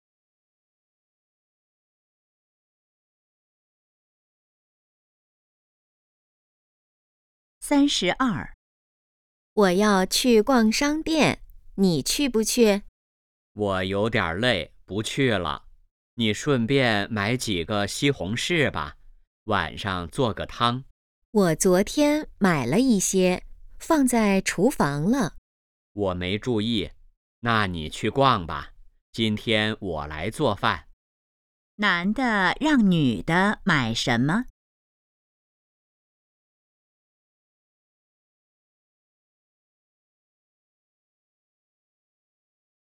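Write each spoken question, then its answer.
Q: 男的让女的买什么?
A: 西红柿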